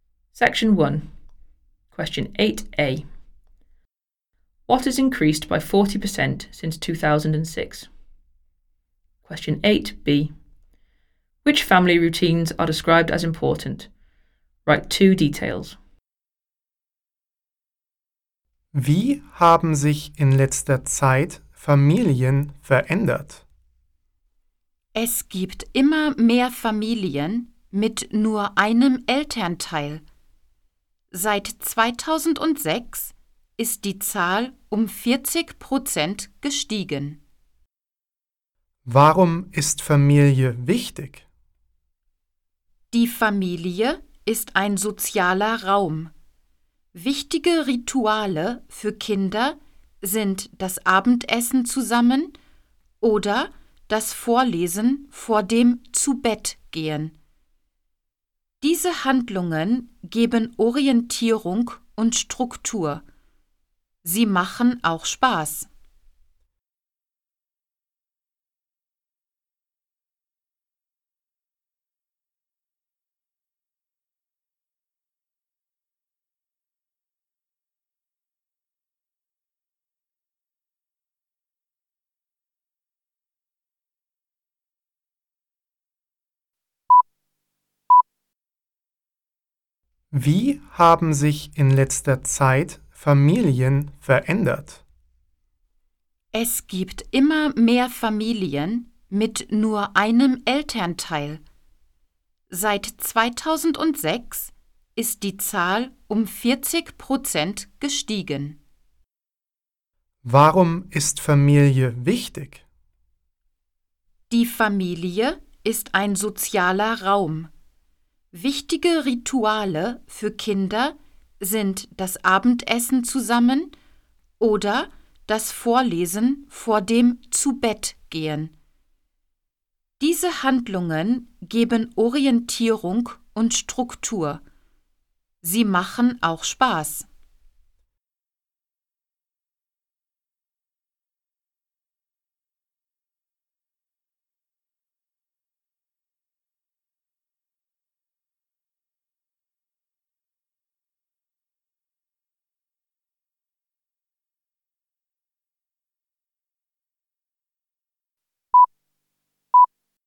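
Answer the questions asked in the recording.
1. The number of single-parent families
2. Eating dinner together and reading aloud before bed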